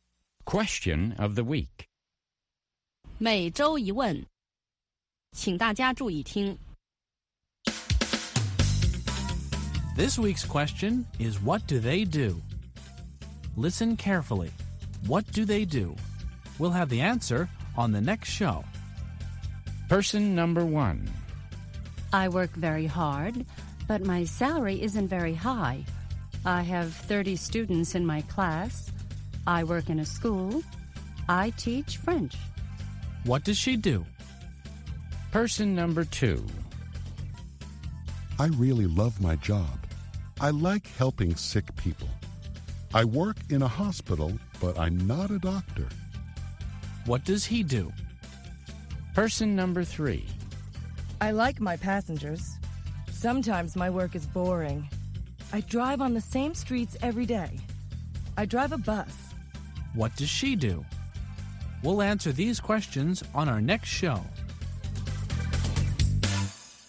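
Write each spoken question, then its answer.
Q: What does she do?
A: She's a French teacher.

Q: What does he do?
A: He's a nurse.

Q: What does she do?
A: She's a bus driver.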